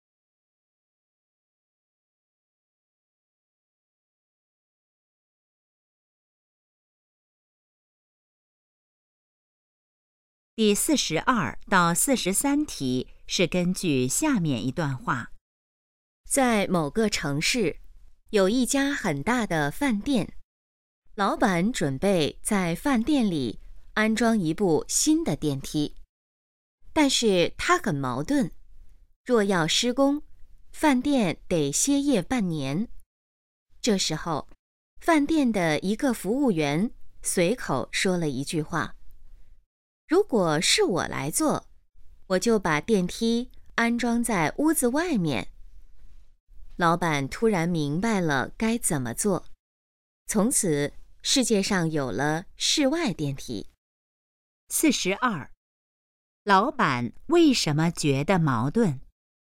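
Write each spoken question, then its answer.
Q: 老板为什么觉得矛盾?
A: 施工的话饭店得歇业半年

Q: 老板最后准备怎么做?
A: 把电梯安装在屋子外面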